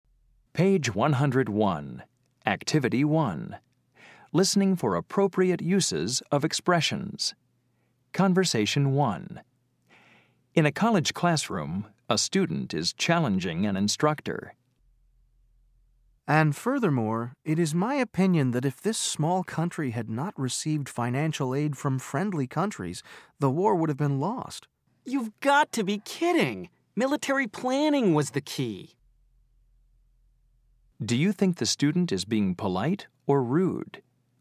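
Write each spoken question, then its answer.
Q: Do you think the student is being polite or rude?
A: rude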